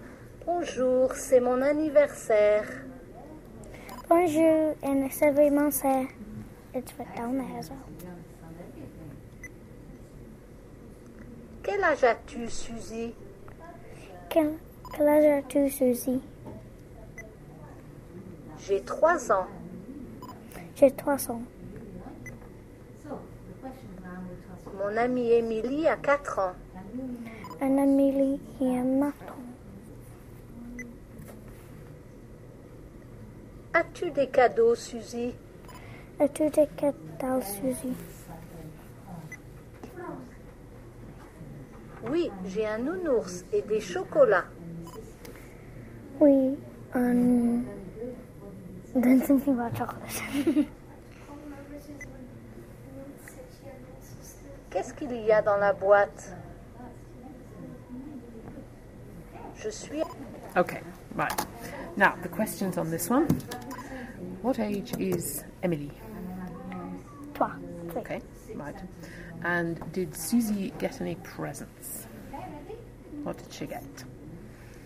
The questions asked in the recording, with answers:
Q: What did she get?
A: Well, she got chocolate, didn't she?